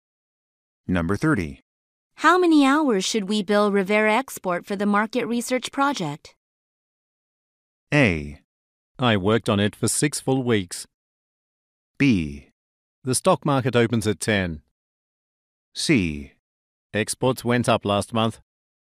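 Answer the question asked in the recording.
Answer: A: I worked on it for 6 full weeks.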